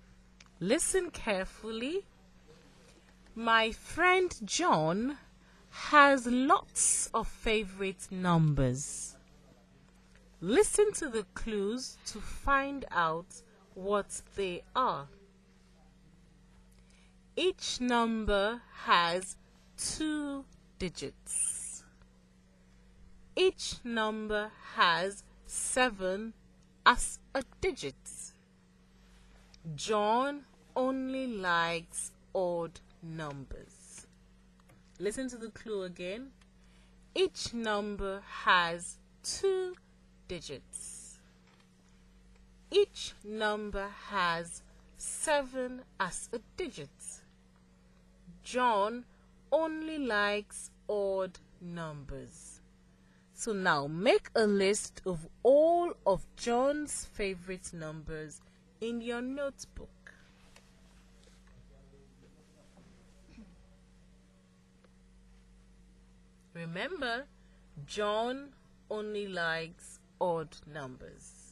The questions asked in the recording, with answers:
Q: So now make a list of all of John's favorite numbers in your notebook.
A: That leaves me with 17, 27, 37, 47, 57, 67, 77, 87, 97, 71, 73, 75, and 79.